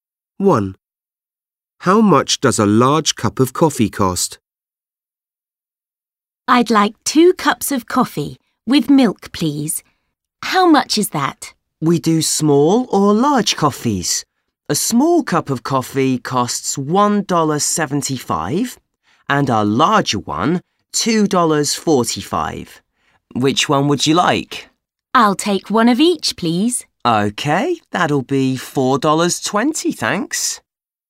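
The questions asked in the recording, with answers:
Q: How much does a large cup of coffee cost?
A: $2.45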